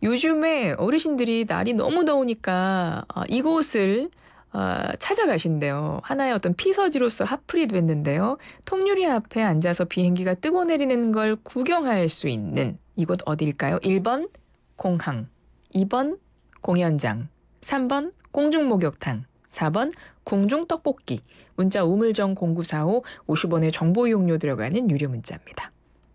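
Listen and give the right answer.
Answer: 1: 공항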